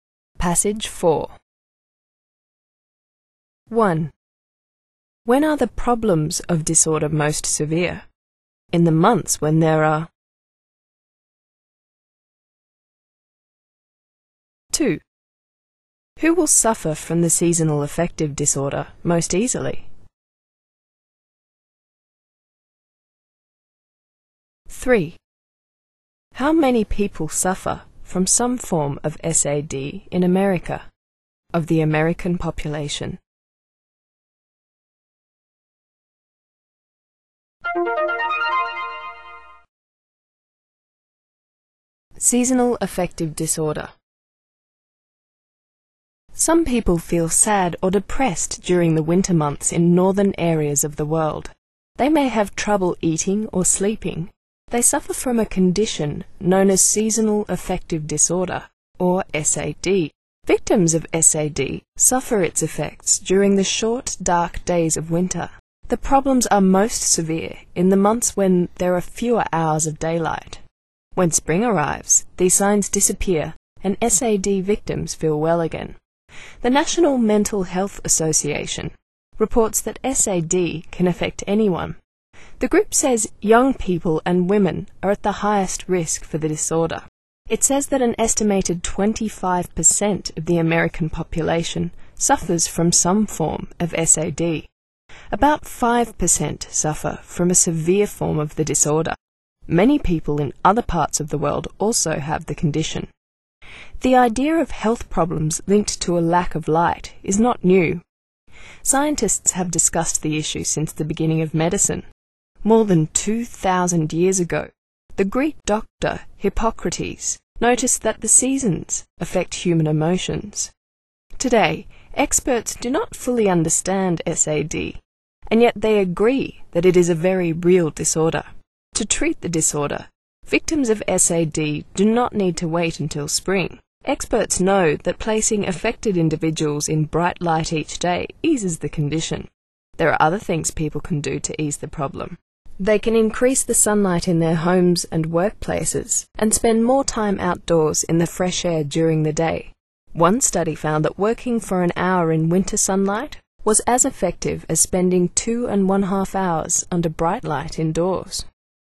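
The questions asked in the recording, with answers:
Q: When are the problems of disorder most severe?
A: In the months when there are fewer hours of daylight

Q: Who will suffer from the seasonal affective disorder most easily?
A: Young people and women

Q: How many people suffer from some form of SAD in America, of the American population?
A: An estimated 25%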